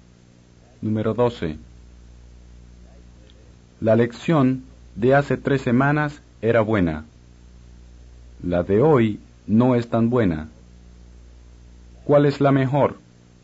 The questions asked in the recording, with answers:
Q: ¿Cuál es la mejor?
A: La lección de hace 3 semanas.